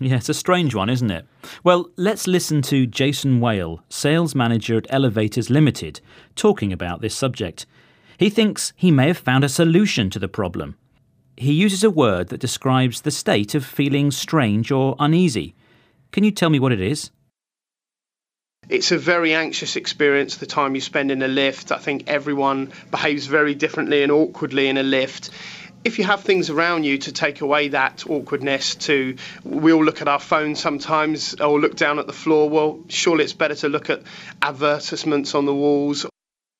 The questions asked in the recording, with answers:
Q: He uses a word that describes the state of feeling strange or uneasy. Can you tell me what it is?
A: He said awkwardness, which describes the state of feeling strange or uneasy.